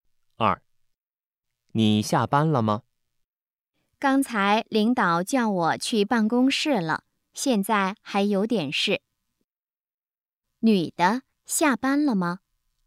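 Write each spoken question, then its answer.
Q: 女的,下班了吗?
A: 还没下班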